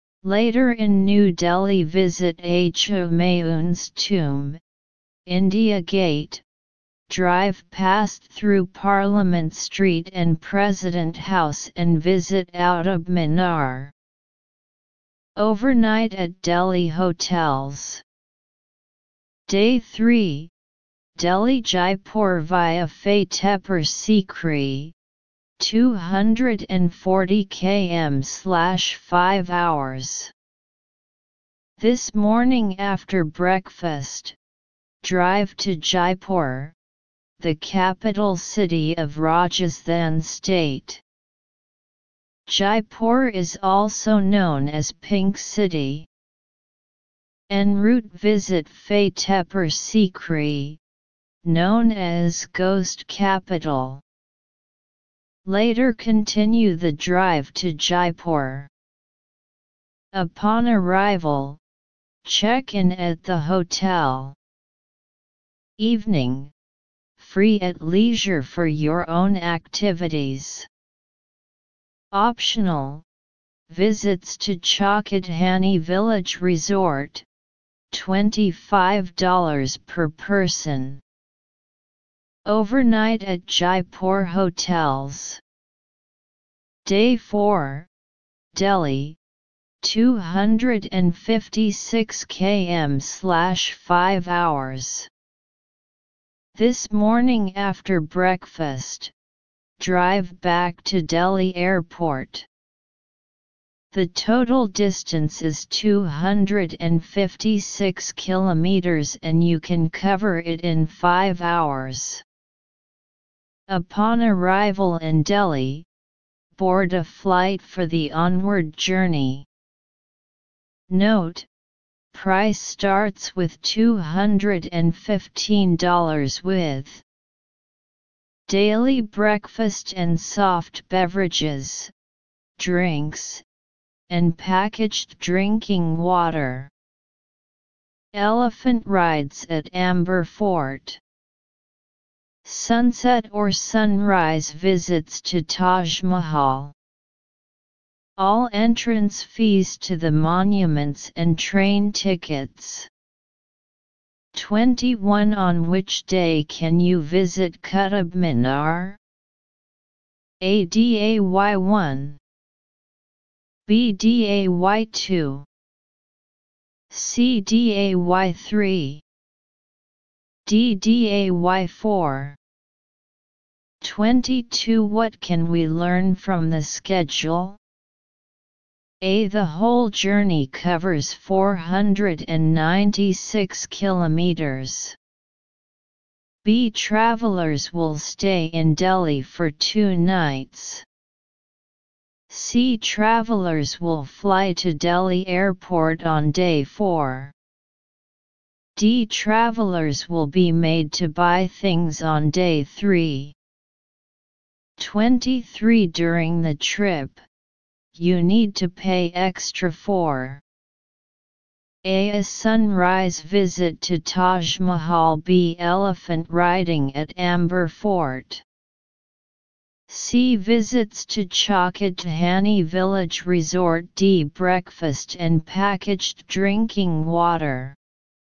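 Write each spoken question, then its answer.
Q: What can we learn from the schedule?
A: The whole journey covers 496 kilometers.

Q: During the trip, you need to pay extra for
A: C: visits to Chokhadhani Village Resort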